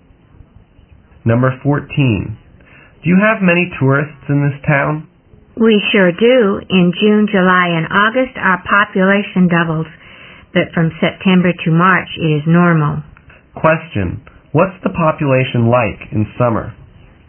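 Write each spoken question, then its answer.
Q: What's the population like in summer?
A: It doubles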